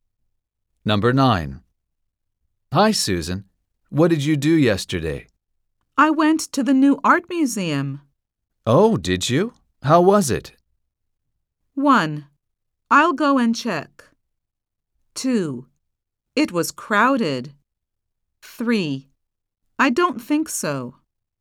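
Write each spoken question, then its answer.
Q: Oh, did you?How was it?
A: 2: It was crowded.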